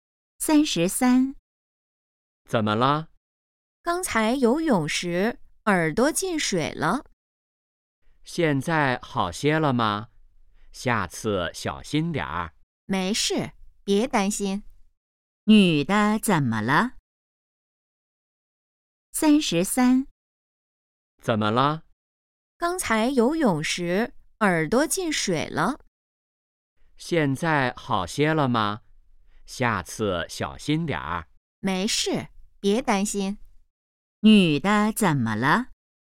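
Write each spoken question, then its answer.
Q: 女的怎么了?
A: 游泳时耳朵进水了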